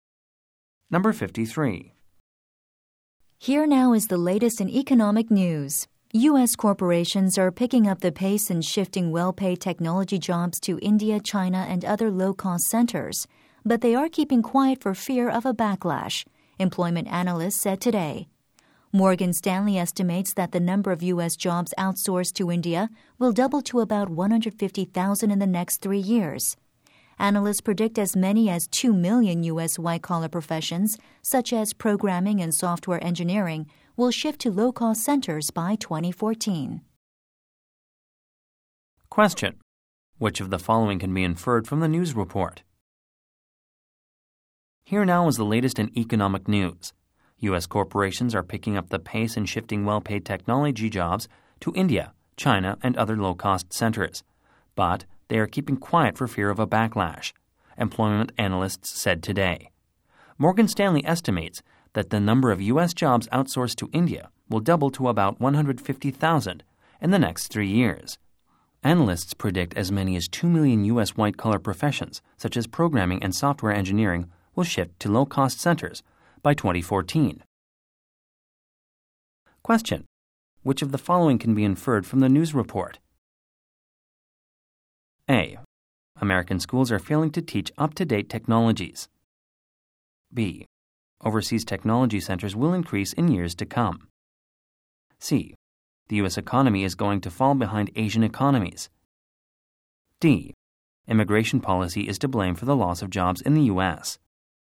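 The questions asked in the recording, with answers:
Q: Which of the following can be inferred from the news report?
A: B: Overseas technology centers will increase in years to come.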